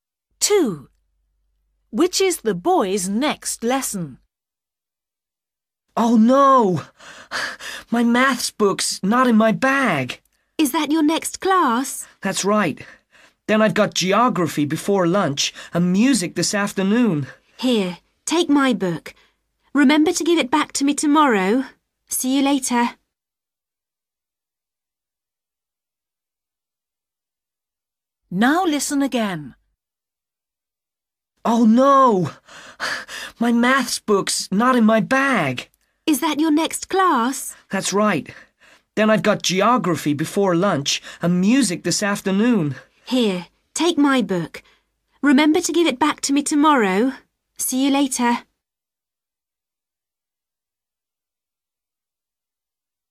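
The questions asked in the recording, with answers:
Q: Which is the boy's next lesson?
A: maths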